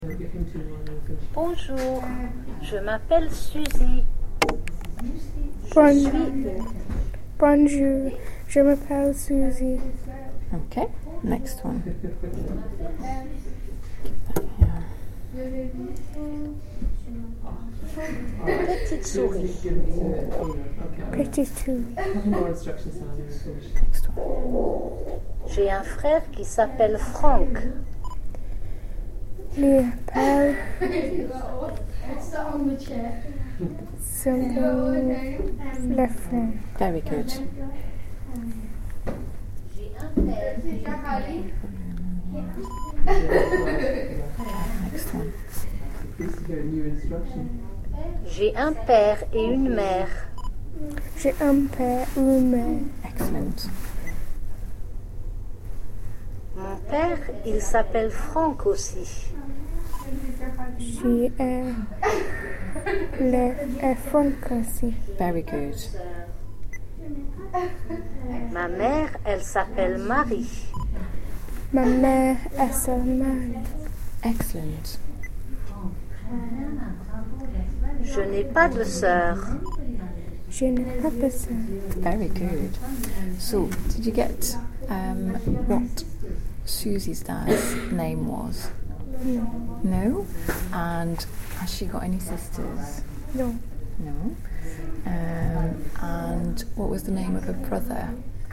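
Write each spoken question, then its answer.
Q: So, did you get what Susie's dad's name was?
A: Franck

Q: And has she got any sisters?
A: No

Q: And what was the name of her brother?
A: Franck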